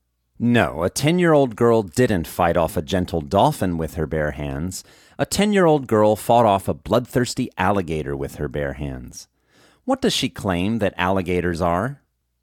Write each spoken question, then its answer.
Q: What does she claim that alligators are?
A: She claims that alligators are misunderstood creatures.